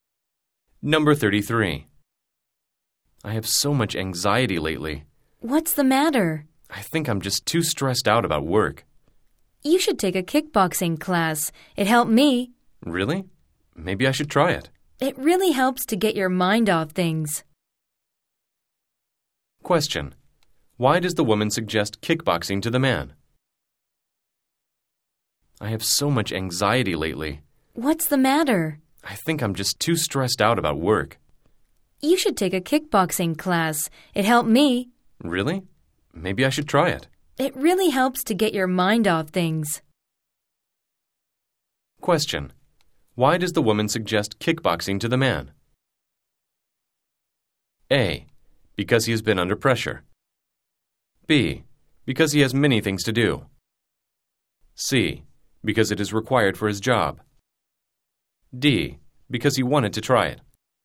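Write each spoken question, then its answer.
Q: Why does the woman suggest kickboxing to the man?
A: A: Because he has been under pressure.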